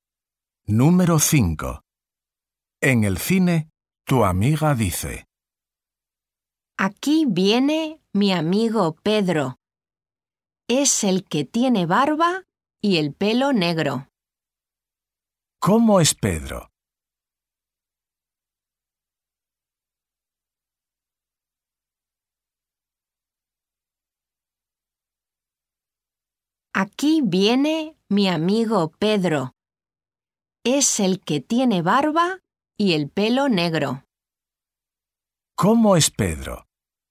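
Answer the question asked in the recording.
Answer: tiene barba y el pelo negro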